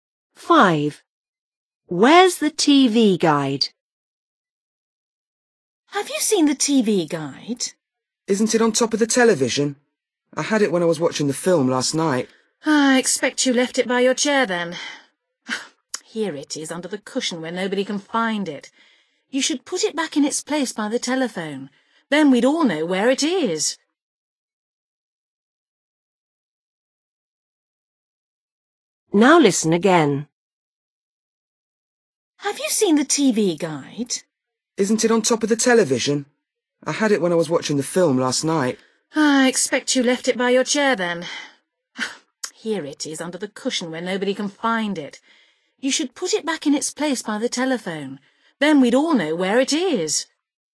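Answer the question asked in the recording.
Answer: under the cushion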